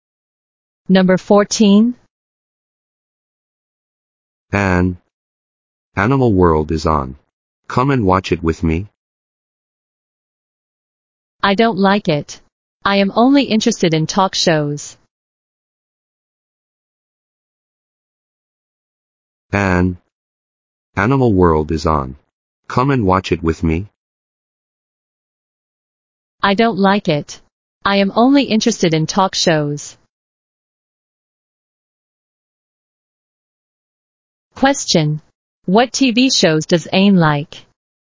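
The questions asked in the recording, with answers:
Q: Question. What TV shows does Anne like?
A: Talk shows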